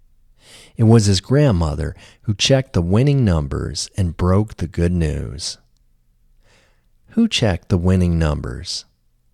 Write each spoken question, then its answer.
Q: Who checked the winning numbers?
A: His grandmother checked the winning numbers.